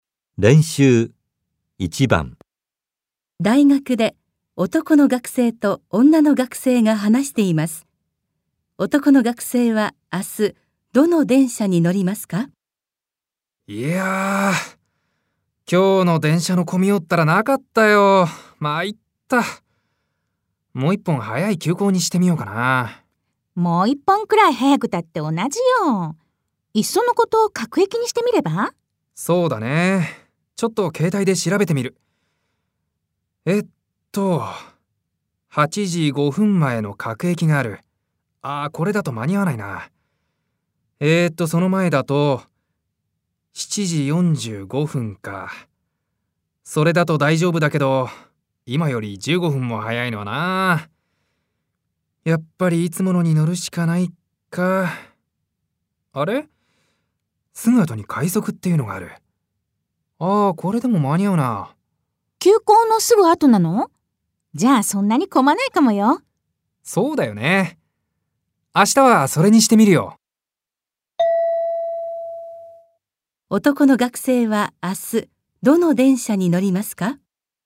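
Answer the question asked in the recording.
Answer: いつもの急行のすぐ後の快速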